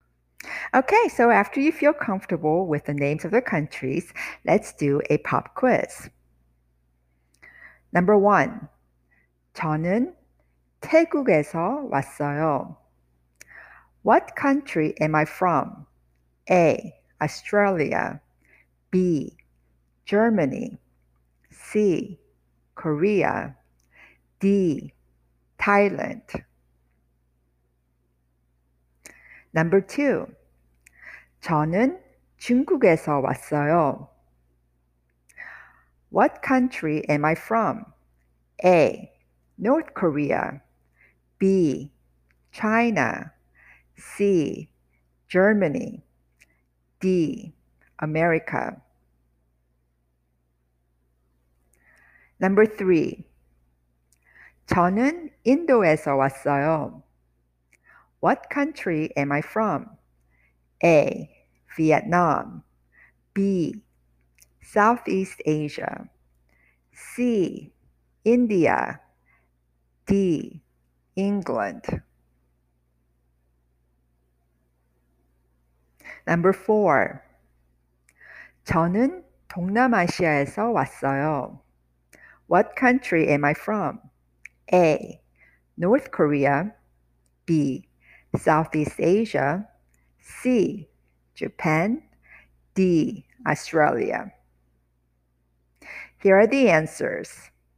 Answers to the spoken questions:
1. Number one, D. Thailand.
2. Number two, B. China.
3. Number three, C. India.
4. Number four, B. Southeast Asia.